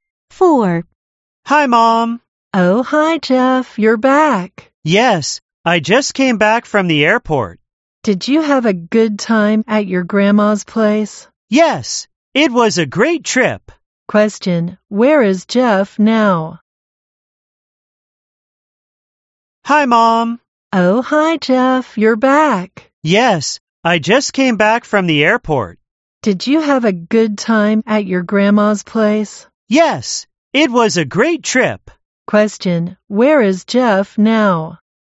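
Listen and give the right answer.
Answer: At home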